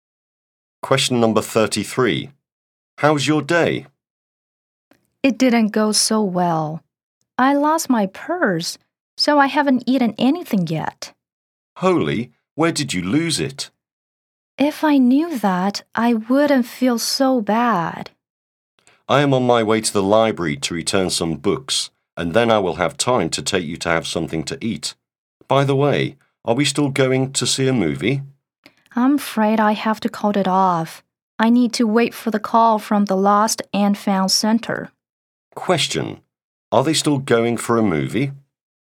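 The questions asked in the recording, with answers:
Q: Question: Are they still going for a movie?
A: No, the movie is called off.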